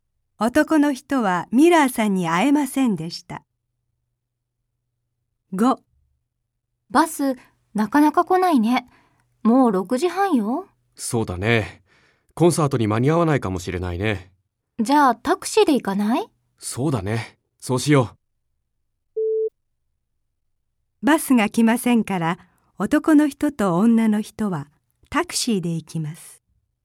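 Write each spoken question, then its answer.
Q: バスが来ませんから、男の人と女の人はタクシーで行きます。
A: ○(正しい)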